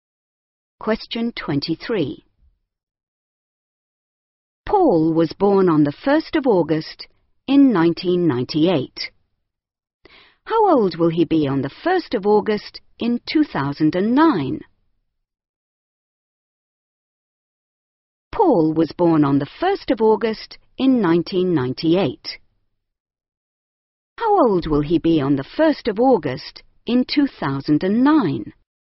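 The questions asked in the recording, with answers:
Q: How old will he be on the 1st of August in 2009?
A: 11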